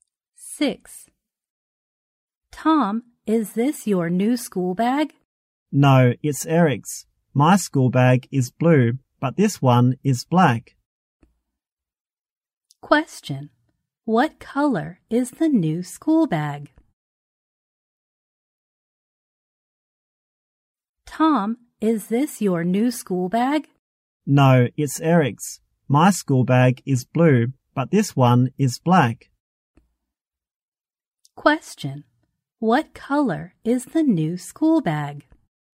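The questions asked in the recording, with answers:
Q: What color is the new school bag?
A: Black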